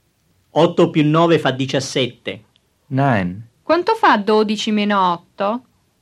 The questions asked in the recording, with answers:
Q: Quanto fa 12 meno 8?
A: 12 meno 8 fa 4.